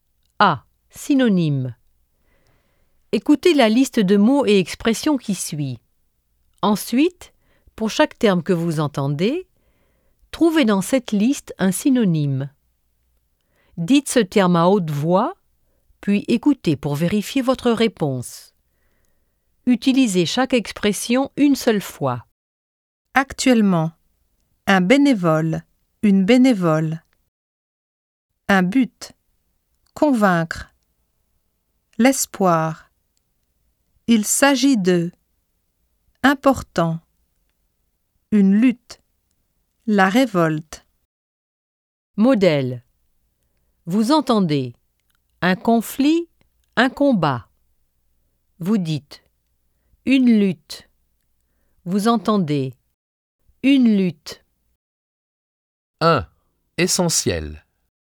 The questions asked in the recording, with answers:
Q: Essentiel.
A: Important.